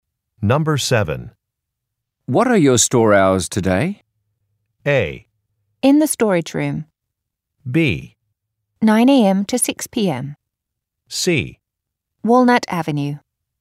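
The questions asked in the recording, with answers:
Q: What are your store hours today?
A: B: 9 a.m. to 6 p.m.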